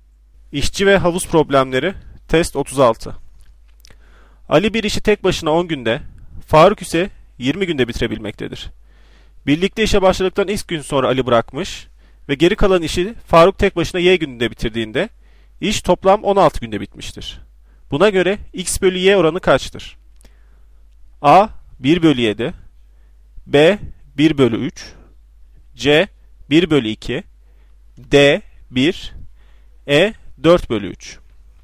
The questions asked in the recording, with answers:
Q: Buna göre x bölü y oranı kaçtır?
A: Doğru cevap A 1 bölü 7.